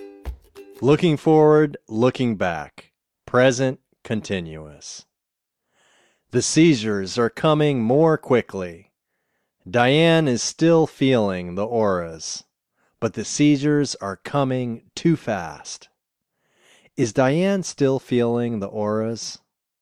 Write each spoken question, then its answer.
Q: Is Diane still feeling the auras?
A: Yes, she is still feeling the auras.